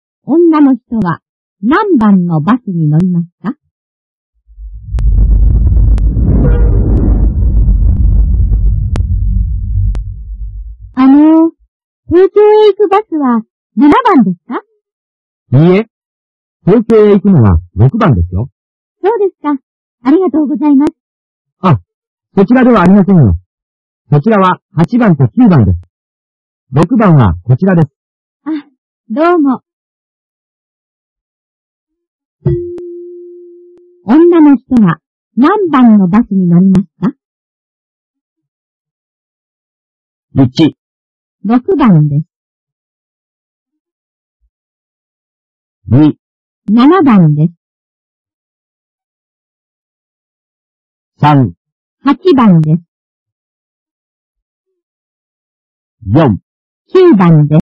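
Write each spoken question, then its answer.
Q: 女の人は何番のバスに乗りますか?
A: 1: 6番です。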